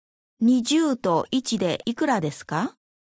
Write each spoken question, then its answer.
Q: 20と1でいくらですか?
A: 21